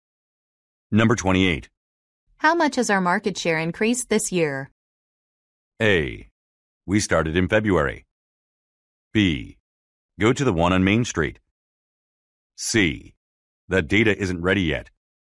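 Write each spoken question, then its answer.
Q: How much has our market share increased this year?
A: C: That data isn't ready yet.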